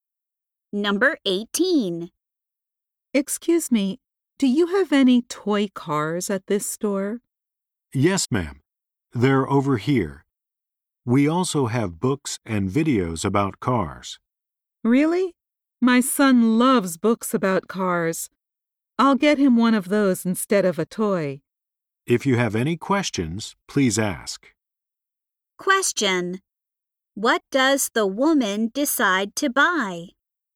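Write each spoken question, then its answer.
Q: What does the woman decide to buy?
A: A book about cars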